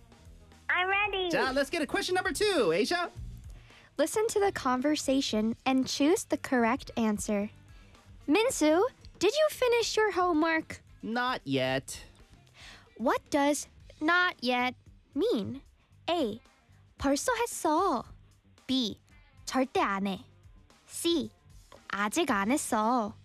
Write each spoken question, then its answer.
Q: What does not yet mean?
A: C. 아직 안 했어.